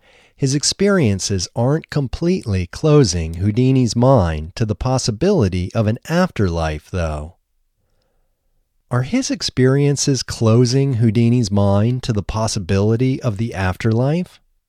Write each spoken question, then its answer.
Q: Are his experiences closing Houdini's mind to the possibility of the afterlife?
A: No, his experiences aren't completely closing Houdini's mind to the possibility of an afterlife.